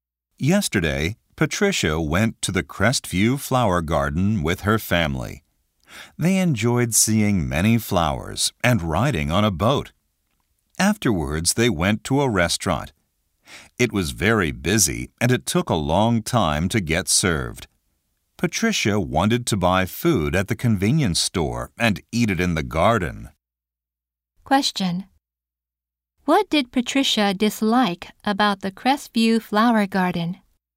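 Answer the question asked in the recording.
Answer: The restaurant was busy and it took a long time to get served.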